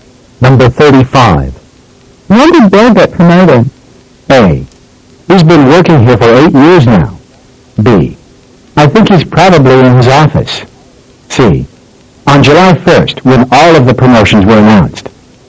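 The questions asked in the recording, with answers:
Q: When did Bill get promoted?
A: C: On July 1st, when all of the promotions were announced.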